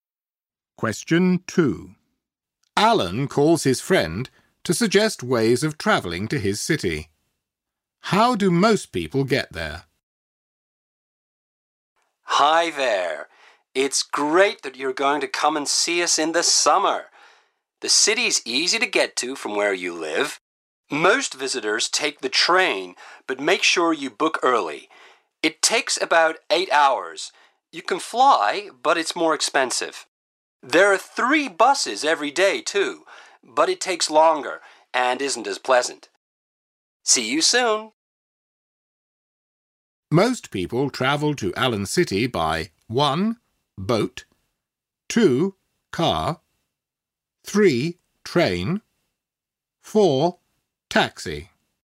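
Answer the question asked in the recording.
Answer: 3: Train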